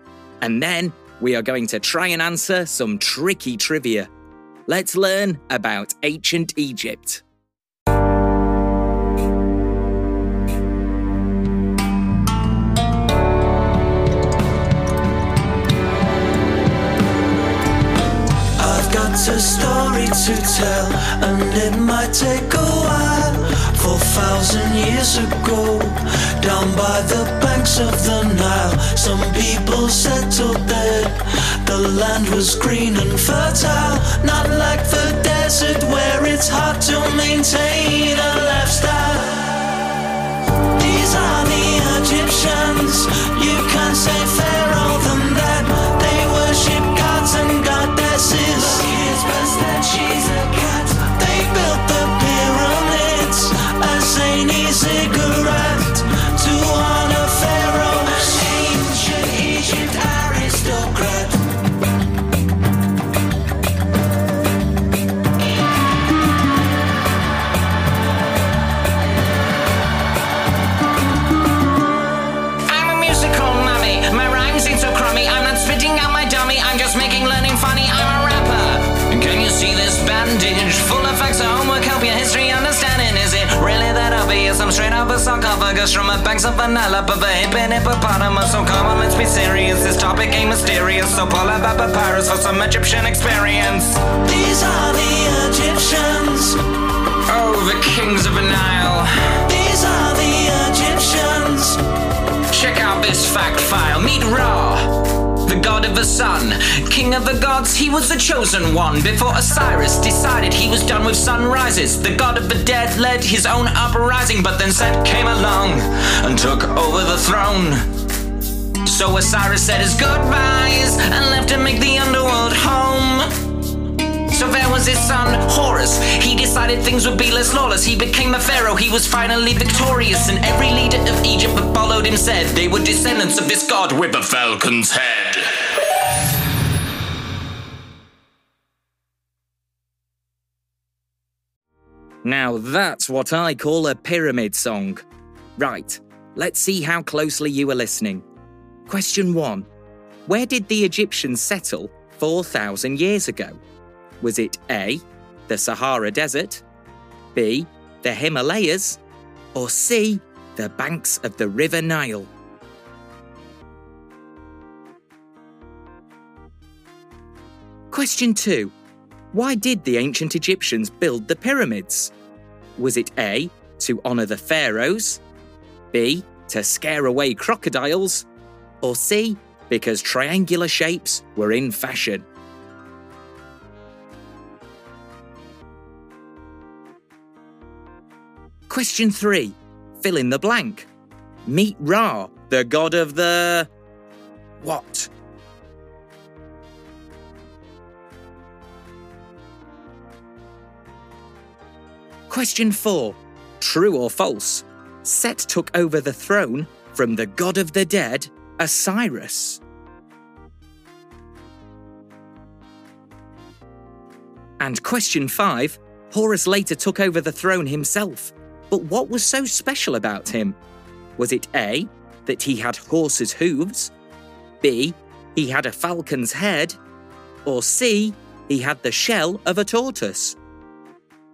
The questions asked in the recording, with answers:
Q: Where did the Egyptians settle 4,000 years ago?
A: the answer is C, the banks of the River Nile.

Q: Fill in the blank. Meet Ra, the god of the... what?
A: Meet Ra, the god of the sun.

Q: True or false? Set took over the throne from the god of the dead, Osiris.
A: The answer is true.

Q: Horus later took over the throne himself. But what was so special about him?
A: the answer is actually B.